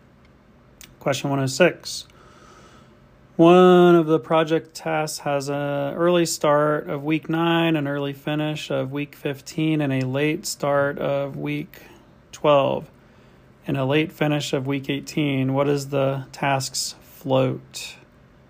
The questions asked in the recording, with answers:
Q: What is the task's float?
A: three weeks.